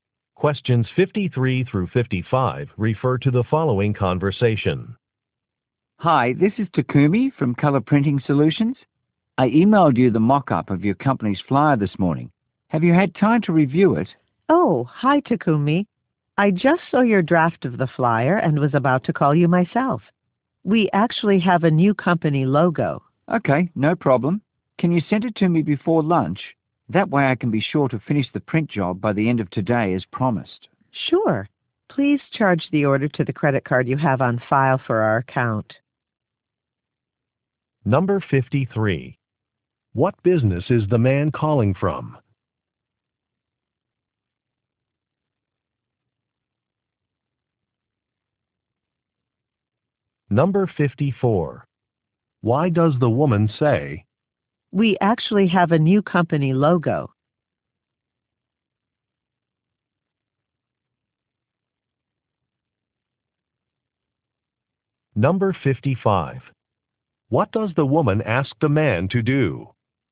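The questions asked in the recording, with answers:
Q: What business is the man calling from?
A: A printing company

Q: Why does the woman say, "We actually have a new company logo"?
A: To indicate the flyer needs to be revised

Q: What does the woman ask the man to do?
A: Charge the order to the credit card on file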